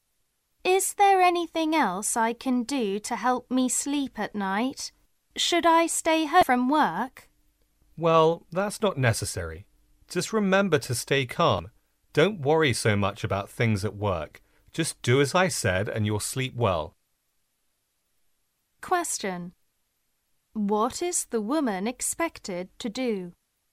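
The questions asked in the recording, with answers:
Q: What is the woman expected to do?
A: Stay calm and not worry so much about work.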